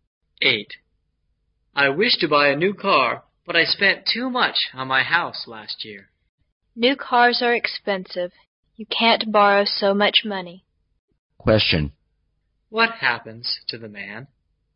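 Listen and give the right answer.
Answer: He can't afford a new car.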